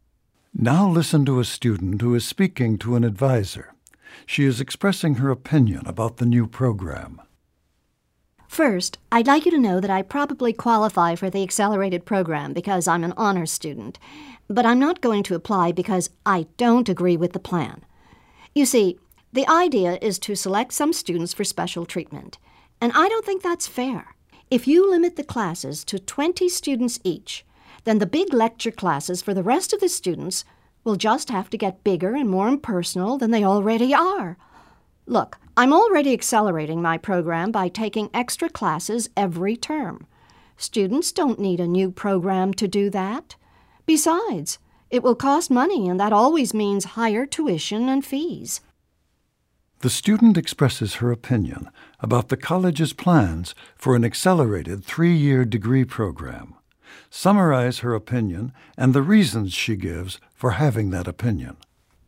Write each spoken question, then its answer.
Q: Summarize her opinion and the reasons she gives for having that opinion.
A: The woman feels that the accelerated program is unfair because the large lecture classes, the ones for the students who aren't admitted to the program, I mean the new program, those classes will probably be even larger in order to limit the number of students in the accelerated classes to 20.